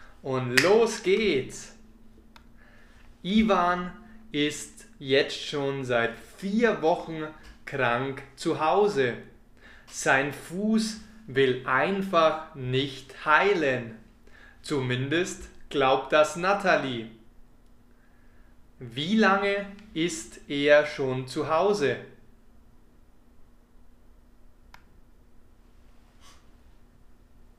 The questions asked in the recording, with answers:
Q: Wie lange ist er schon zu Hause?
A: Vier Wochen. Er ist schon seit 4 Wochen zu Hause.